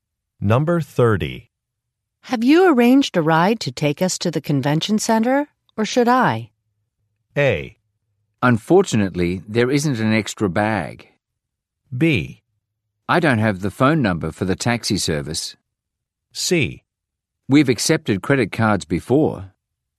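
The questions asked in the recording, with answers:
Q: Have you arranged a ride to take us to the convention center, or should I?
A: B: I don't have the phone number for the taxi service.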